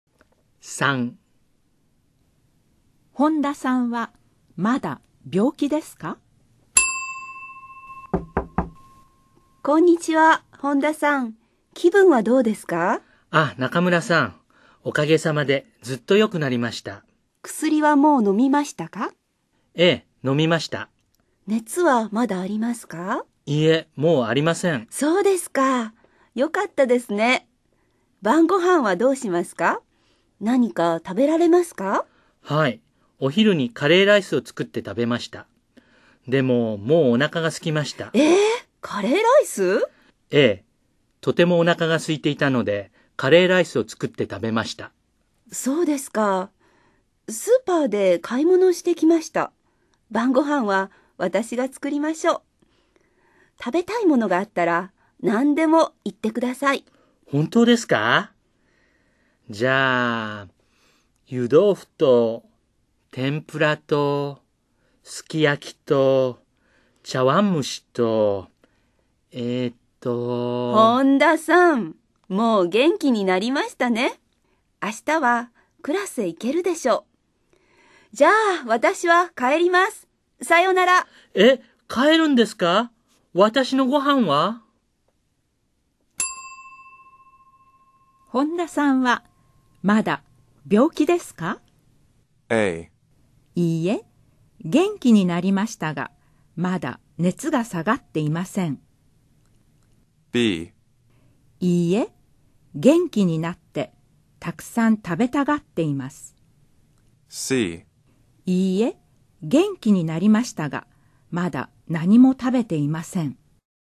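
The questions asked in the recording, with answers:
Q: 本田さんは、まだ病気ですか?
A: B: いいえ、元気になって、たくさん食べたがっています。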